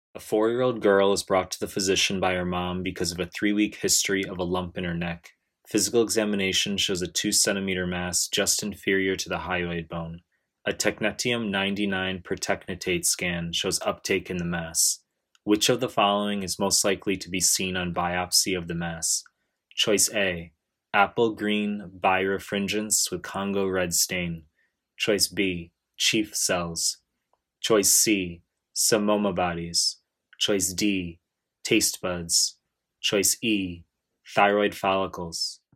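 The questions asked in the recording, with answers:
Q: Which of the following is most likely to be seen on biopsy of the mass?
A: E: thyroid follicles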